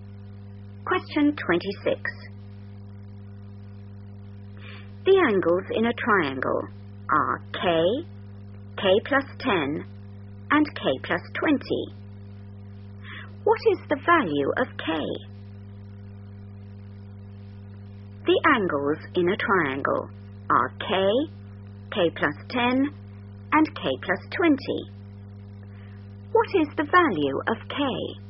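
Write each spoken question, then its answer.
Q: What is the value of K?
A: 50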